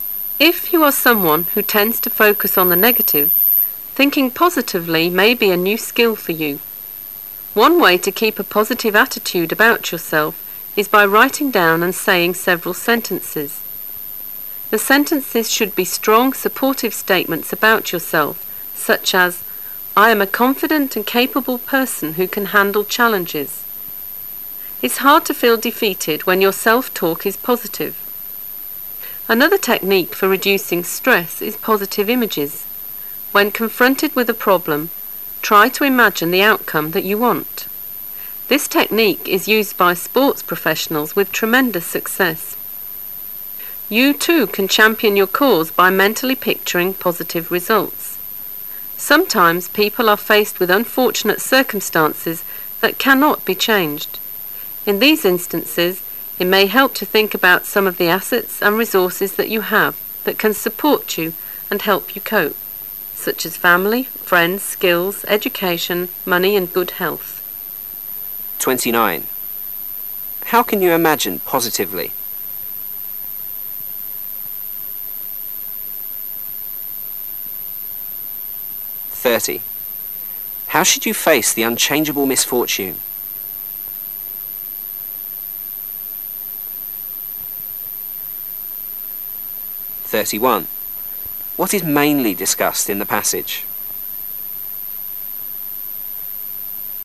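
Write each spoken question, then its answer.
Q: How can you imagine positively?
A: By mentally picturing the outcome or positive results you want

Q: How should you face the unchangeable misfortune?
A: By thinking about your assets and resources, such as family, friends, skills, education, money and good health

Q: What is mainly discussed in the passage?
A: Ways of thinking positively to reduce stress

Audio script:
[解析] 29-31 If you are someone who tends to focus on the negative, [31] thinking positively may be a new skill for you. One way to keep a positive attitude about yourself is by writing down and saying several sentences. The sentences should be strong, supportive statements about yourself such as "I am a confident and capable person who can handle challenges." It's hard to feel defeated when your self-talk is positive. Another technique for reducing stress is positive images. 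When confronted with a problem, [29] try to imagine the outcome that you want. This technique is used by sport professionals with tremendous success. You too can champion your cause by mentally picturing positive results. Sometimes people are faced with unfortunate circumstances that can not be changed. In these instances, it may help to [30] think about some of the assets and resources that you have that can support you and help you cope such as family, friends, skills, education, money and good health.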